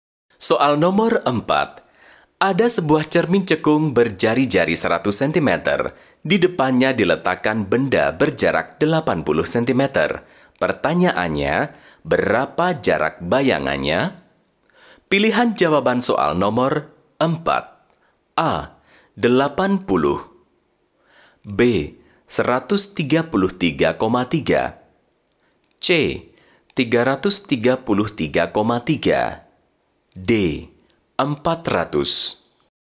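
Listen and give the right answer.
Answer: B: 133,3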